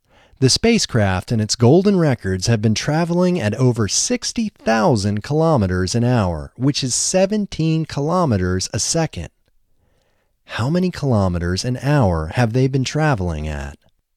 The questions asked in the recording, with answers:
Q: How many kilometers an hour have they been traveling at?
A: They have been traveling at 60,000 kilometers an hour.